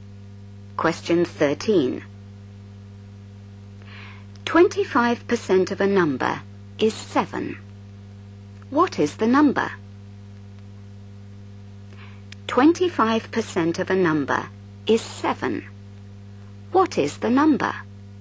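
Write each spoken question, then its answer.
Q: 25% of a number is 7. What is the number?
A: 28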